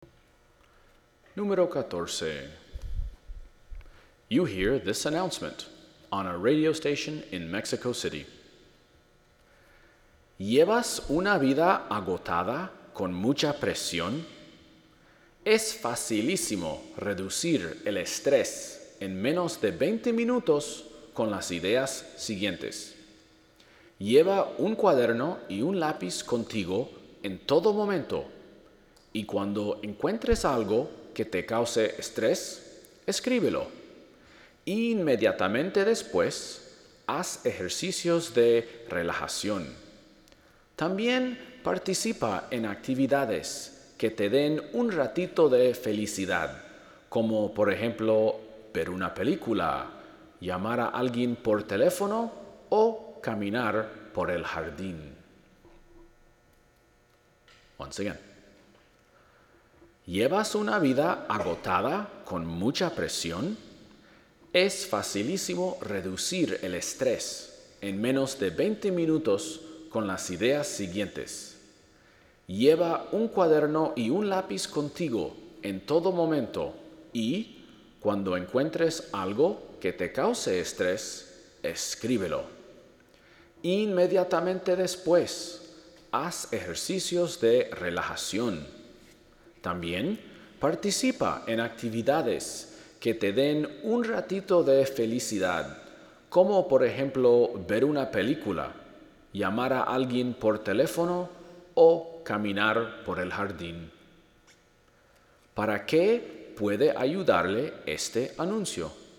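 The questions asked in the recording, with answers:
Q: ¿Para qué puede ayudarle este anuncio?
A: Para reducir el estrés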